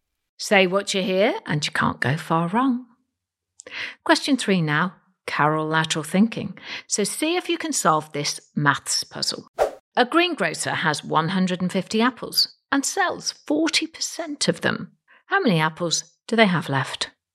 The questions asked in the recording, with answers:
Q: A greengrocer has 150 apples and sells 40% of them. How many apples do they have left?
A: Well, the answer is 90 apples.